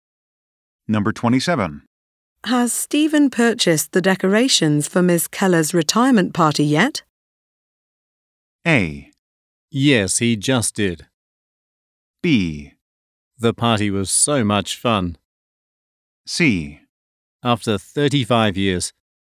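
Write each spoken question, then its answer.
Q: Has Stephen purchased the decorations for Miss Keller's retirement party yet?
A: A: Yes, he just did.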